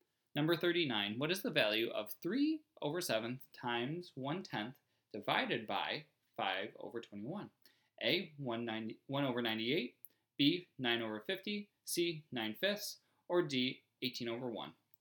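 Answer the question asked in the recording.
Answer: B: 9/50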